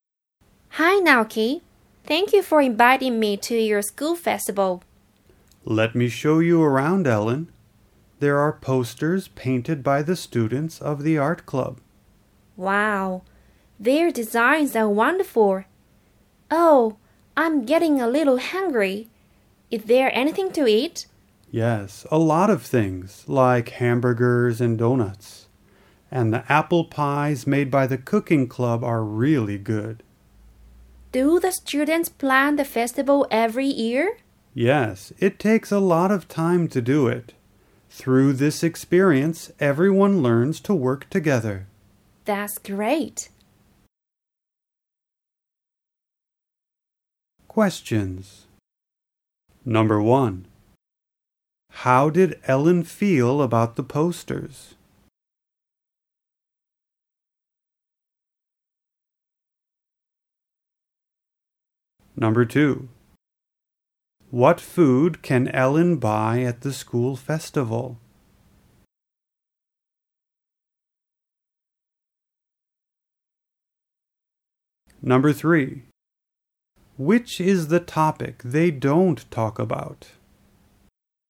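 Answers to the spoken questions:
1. She thought their designs were wonderful
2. Hamburgers, donuts and apple pies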